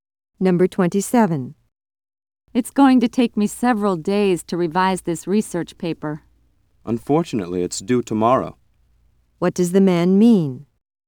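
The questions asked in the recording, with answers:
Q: What does the man mean?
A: He doesn't have enough time to revise the paper before it's due.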